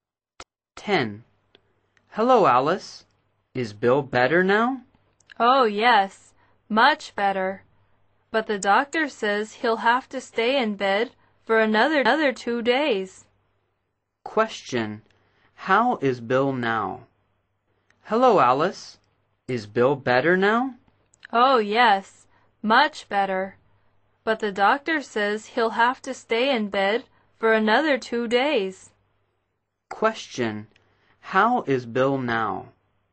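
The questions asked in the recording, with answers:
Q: How is Bill now?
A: Much better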